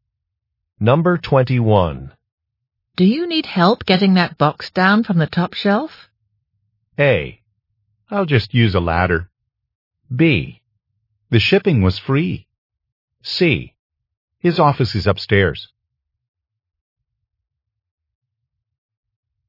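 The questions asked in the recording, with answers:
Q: Do you need help getting that box down from the top shelf?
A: A: I'll just use a ladder.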